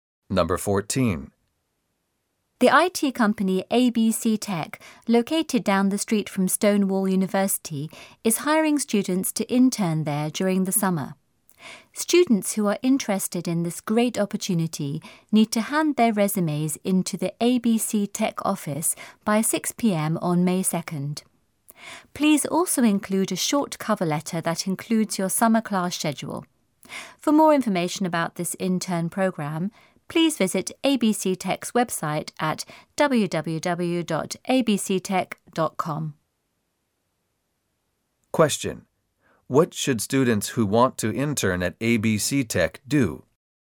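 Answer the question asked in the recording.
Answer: Hand their resumes, with a short cover letter that includes their summer class schedule, in to the ABC Tech office by 6 p.m. on May 2nd.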